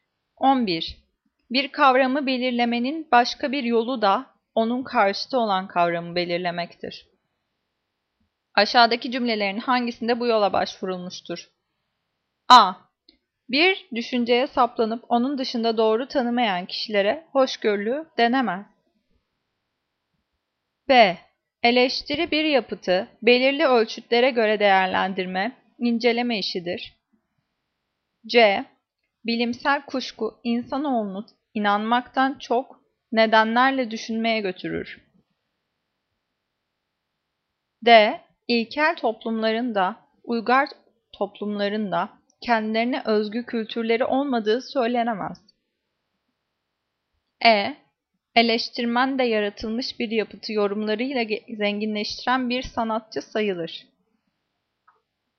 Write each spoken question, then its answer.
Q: Aşağıdaki cümlelerin hangisinde bu yola başvurulmuştur?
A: Cevap A. Bir düşünceye saplanıp onun dışında doğru tanımayan kişilere hoşgörülü denemez.